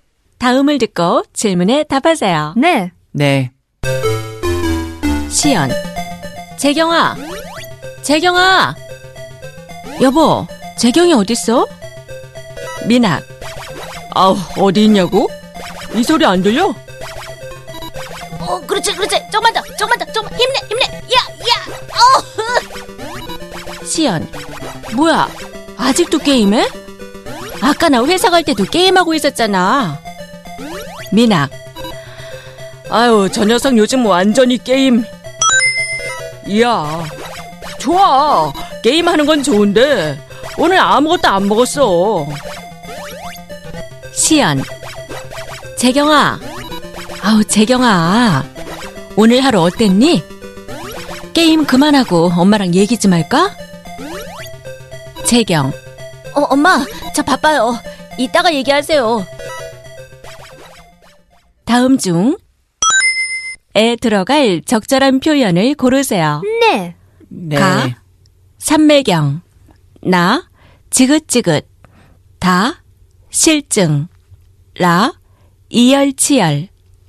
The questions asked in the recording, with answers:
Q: 다음 중 에 들어갈 적절한 표현을 고르세요.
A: 가 삼맥영 means to be absorbed in something.